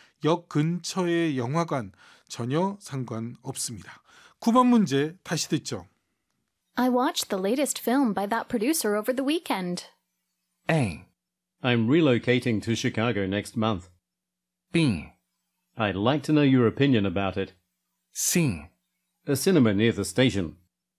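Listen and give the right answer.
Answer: B: I'd like to know your opinion about it.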